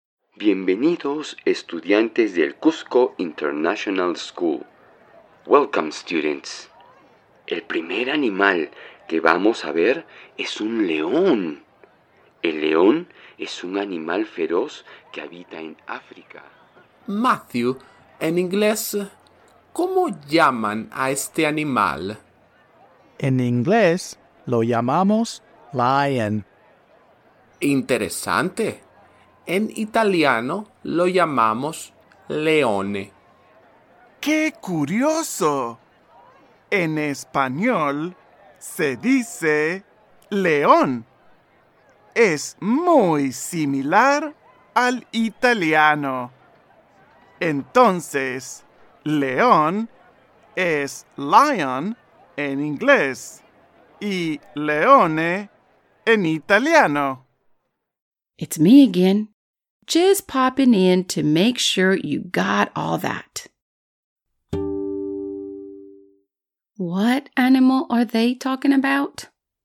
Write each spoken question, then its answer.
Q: What animal are they talking about?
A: Right, a lion.